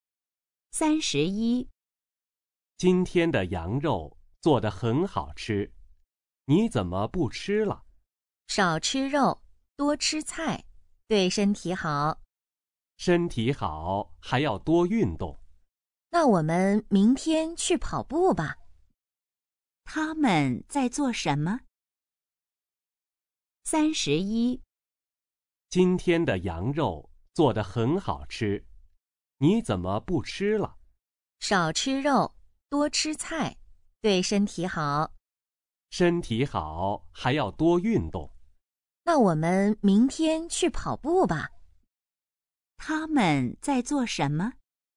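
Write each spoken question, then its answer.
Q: 他们在做什么?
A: 吃饭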